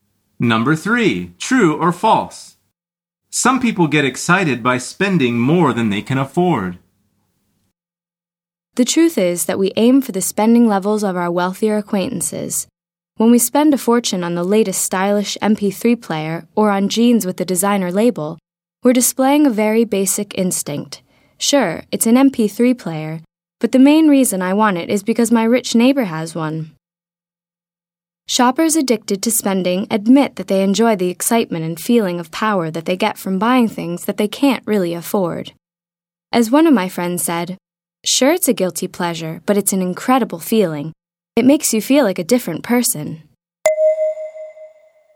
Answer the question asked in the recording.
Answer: The answer is true.